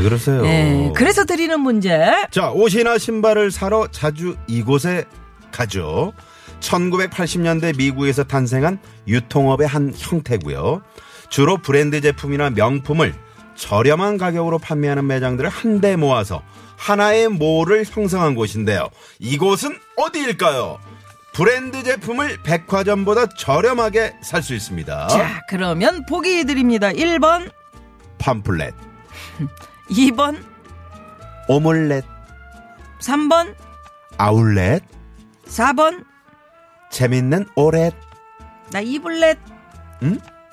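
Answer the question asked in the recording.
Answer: 3: 아울렛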